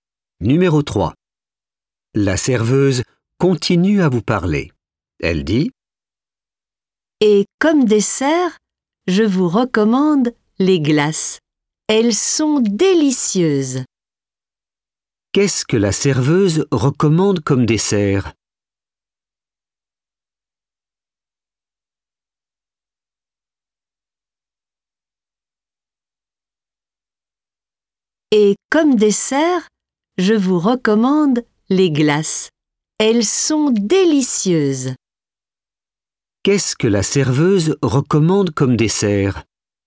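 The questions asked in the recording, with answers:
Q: Qu'est-ce que la serveuse recommande comme dessert?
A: les glaces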